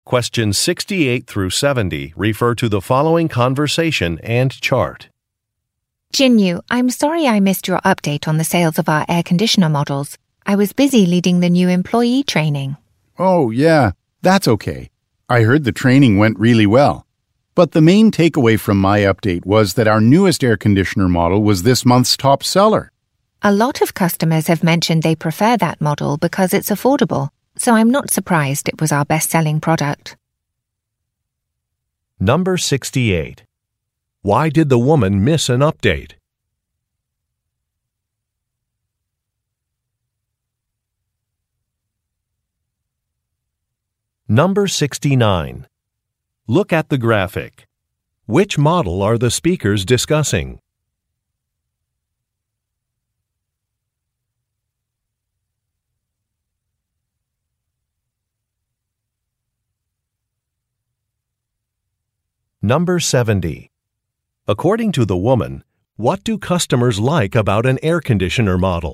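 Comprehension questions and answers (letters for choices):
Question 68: Why did the woman miss an update?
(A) She was on vacation.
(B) She was meeting with clients.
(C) She was training new employees.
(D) She was at a medical appointment.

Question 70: According to the woman, what do customers like about an air-conditioner model?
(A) It is quiet.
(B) It is easy to install.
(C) It is energy efficient.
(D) It is inexpensive.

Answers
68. C
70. D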